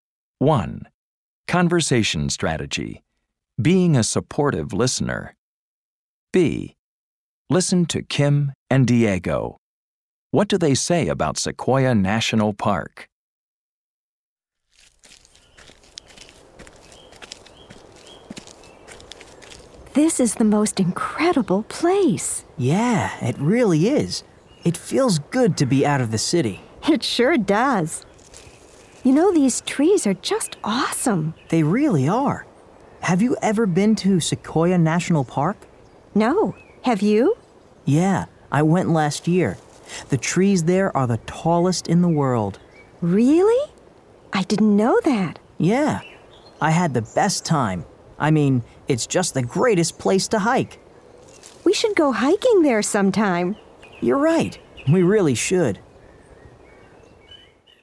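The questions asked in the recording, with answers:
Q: What do they say about Sequoia National Park?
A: Its trees are the tallest in the world, it's the greatest place to hike, and they should go hiking there sometime.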